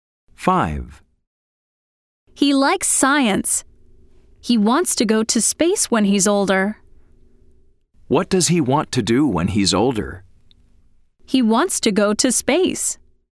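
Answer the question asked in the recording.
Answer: True: He wants to go to space.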